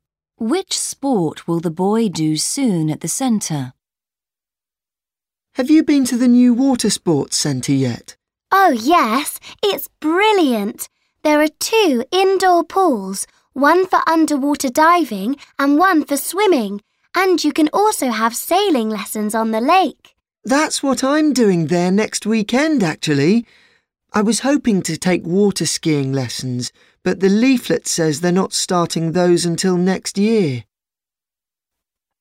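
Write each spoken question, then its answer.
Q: Which sport will the boy do soon at the centre?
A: Sailing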